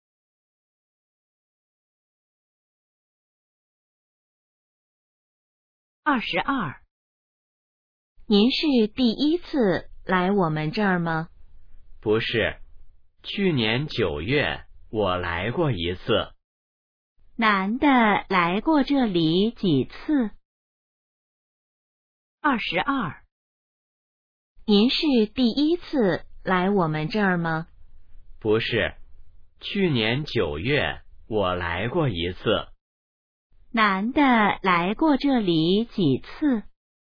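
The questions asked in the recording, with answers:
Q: 男的来过这里几次?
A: 一次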